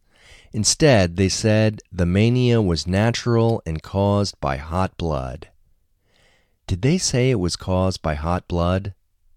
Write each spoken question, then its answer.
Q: Did they say it was caused by hot blood?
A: Yes, they said it was caused by hot blood.